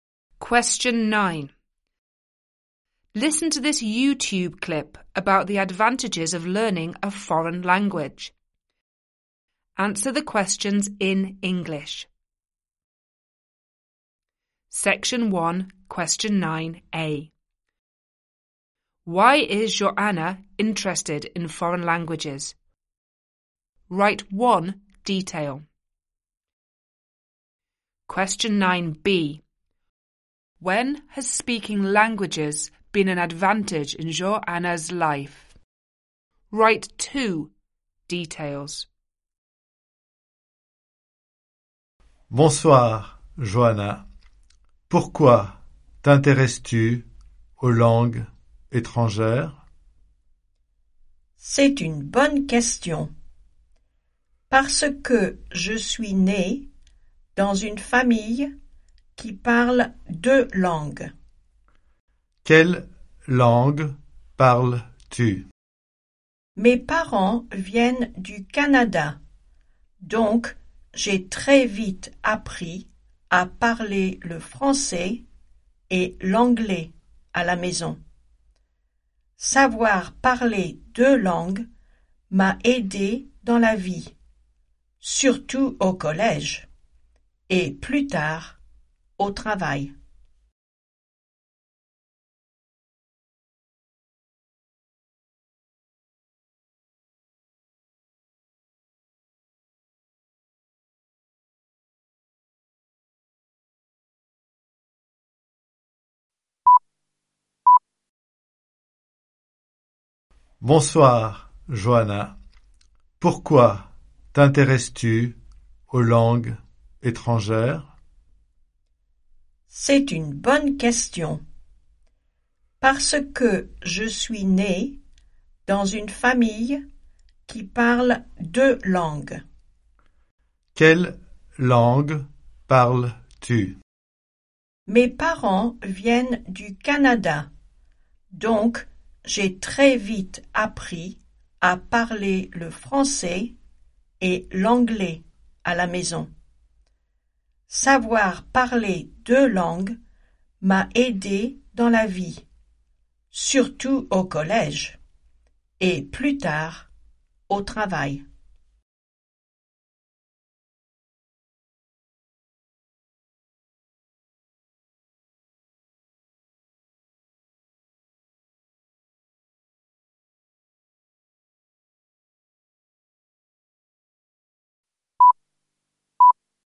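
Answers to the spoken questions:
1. She was born into a family that speaks two languages
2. At school and later at work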